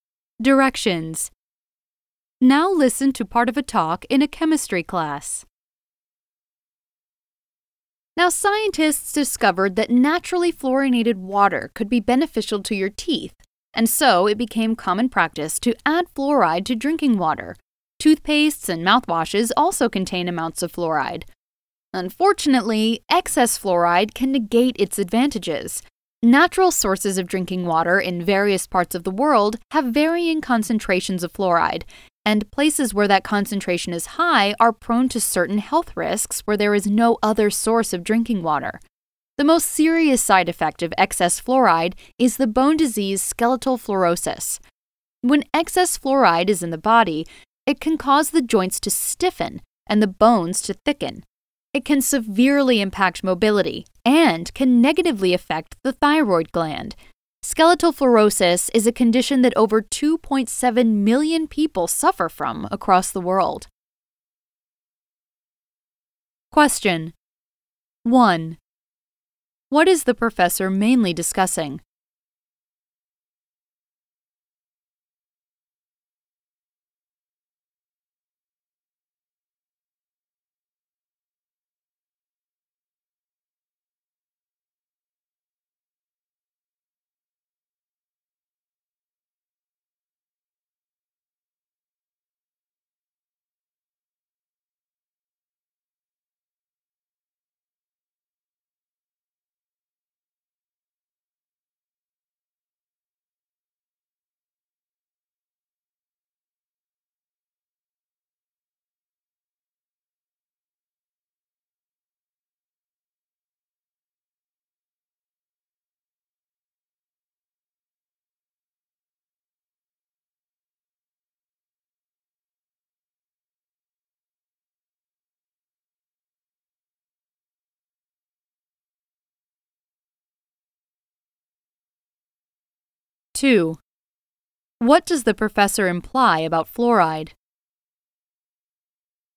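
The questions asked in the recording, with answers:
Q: What is the professor mainly discussing?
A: The health risks of too much fluoride, especially skeletal fluorosis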